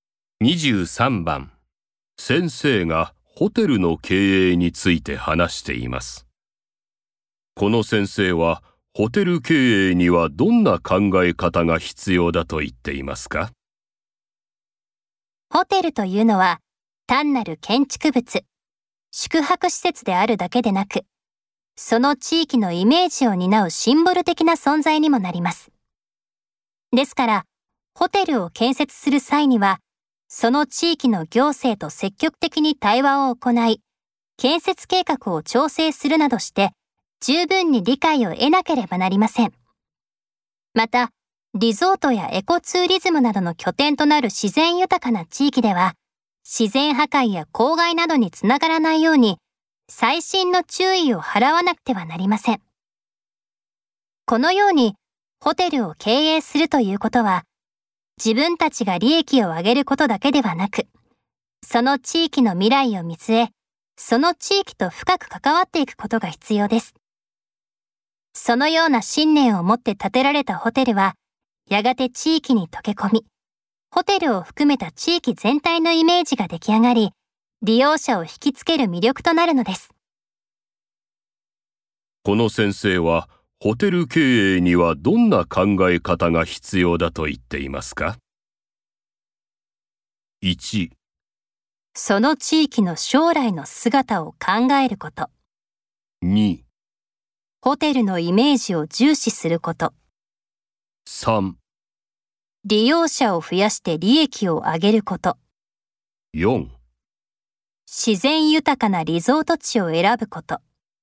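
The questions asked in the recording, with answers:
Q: この先生は、ホテル経営にはどんな考え方が必要だと言っていますか?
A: 1: その地域の将来の姿を考えること。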